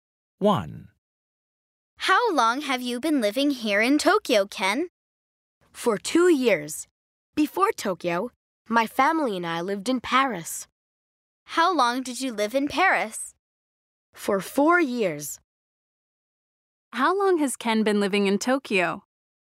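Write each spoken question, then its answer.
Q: How long has Ken been living in Tokyo?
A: For 2 years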